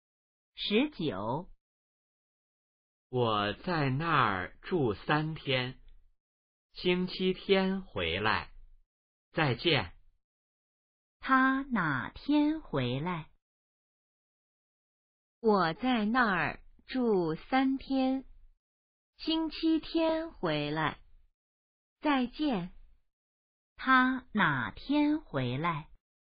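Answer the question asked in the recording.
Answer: 星期天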